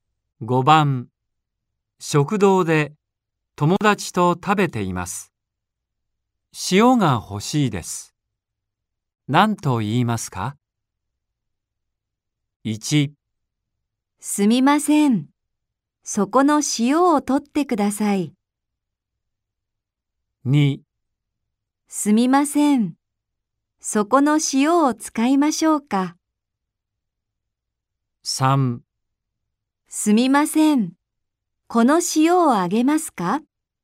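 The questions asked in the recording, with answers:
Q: 食堂で友達と食べています。塩が欲しいです。何と言いますか?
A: 1: すみません。そこの塩を取ってください。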